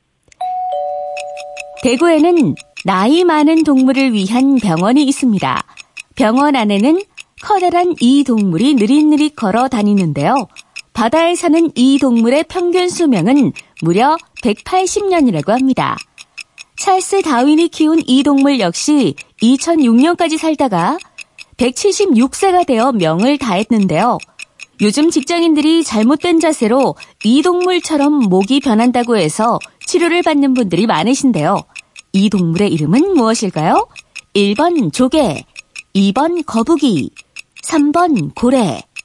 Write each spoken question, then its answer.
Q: 이 동물의 이름은 무엇일까요?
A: 거북이. 정답입니다.